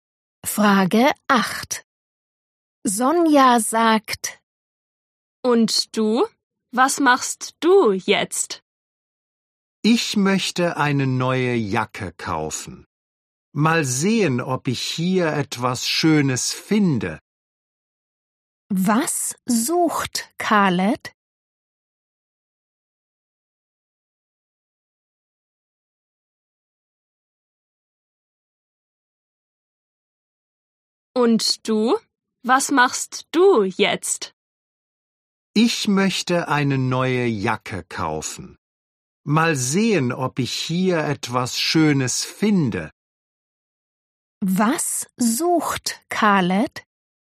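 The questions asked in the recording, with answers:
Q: Was sucht Khaled?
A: eine neue Jacke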